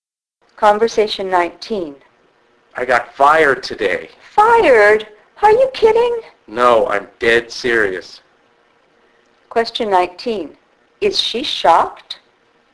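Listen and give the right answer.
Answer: Yes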